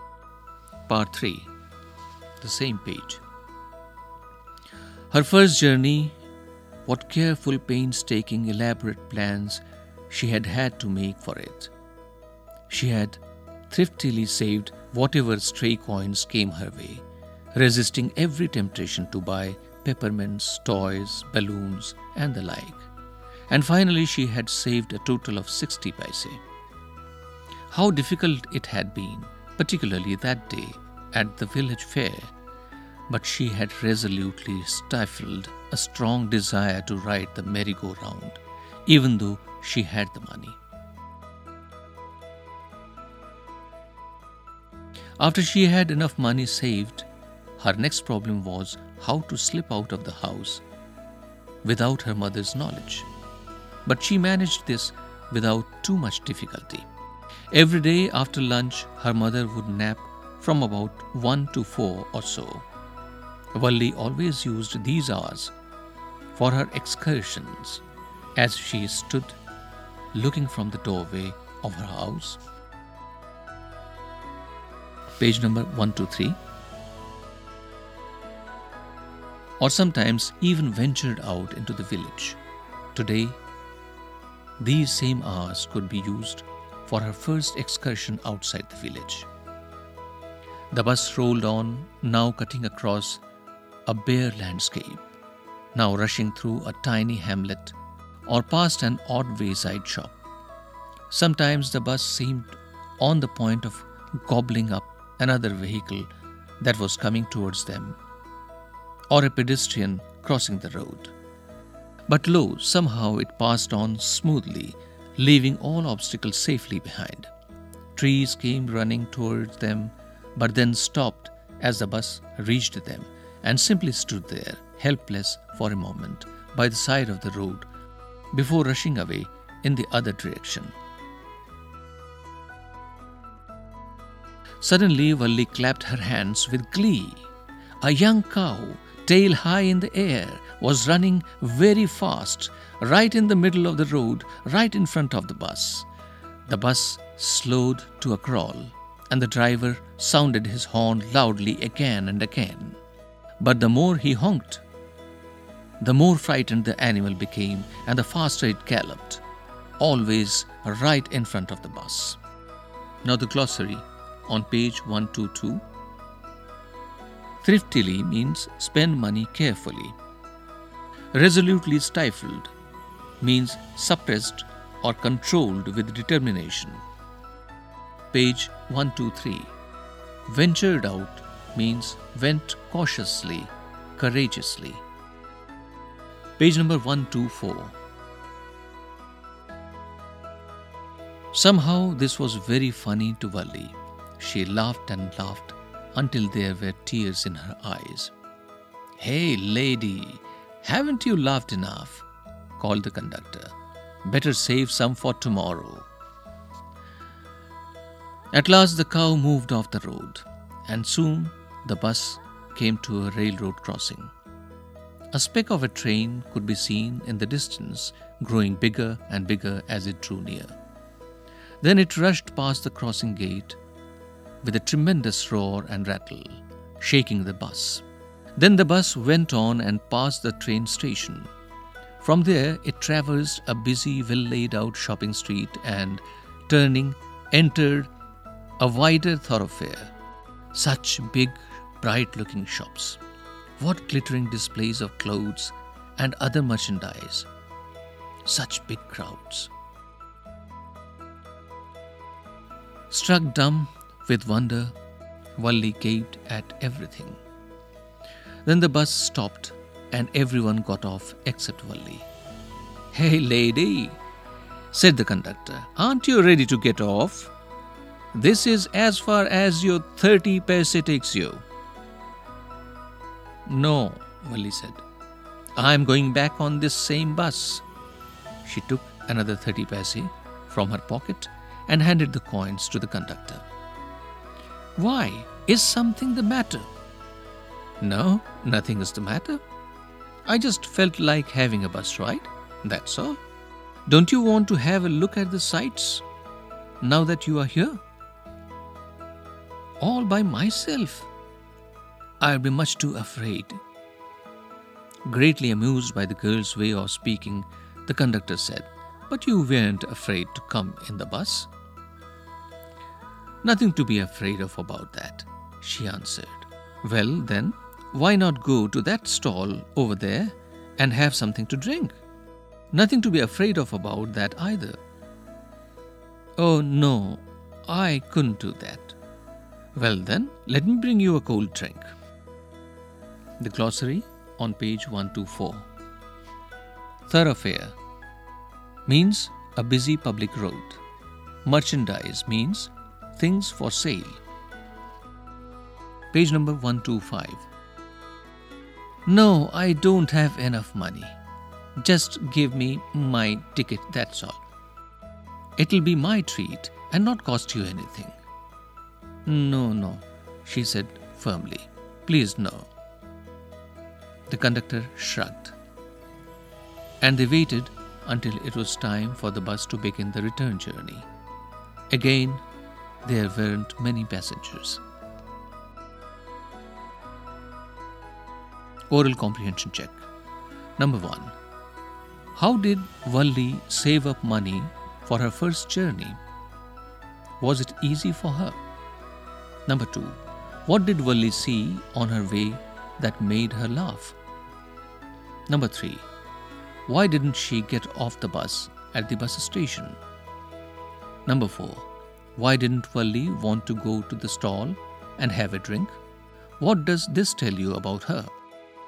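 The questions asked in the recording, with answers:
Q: How did Valli save up money for her first journey?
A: She saved any stray coins she got and didn't spend them on peppermints, toys, balloons or rides

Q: Was it easy for her?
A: No, it was difficult, especially at the village fair

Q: What did Valli see on her way that made her laugh?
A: A young cow running in the middle of the road in front of the bus

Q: Why didn't she get off the bus at the bus station?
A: She only wanted a bus ride and planned to go back on the same bus; she was too afraid to look around alone

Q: Why didn't Valli want to go to the stall and have a drink?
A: She didn't have enough money and wouldn't accept a treat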